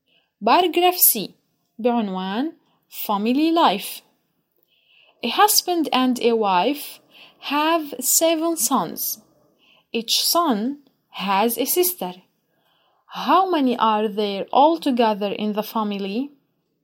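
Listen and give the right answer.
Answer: 10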